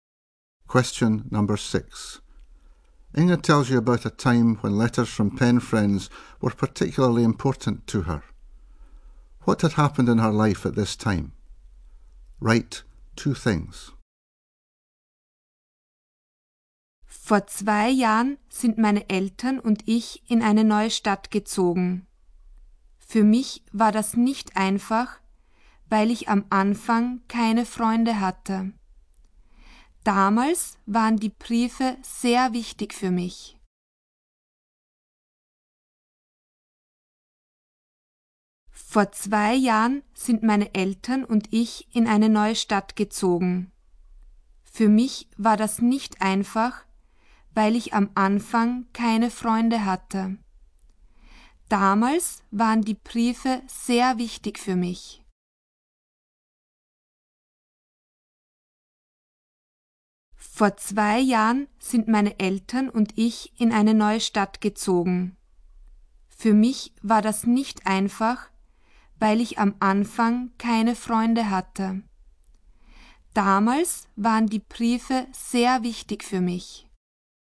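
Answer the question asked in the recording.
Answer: She had moved to a new town and had no friends at first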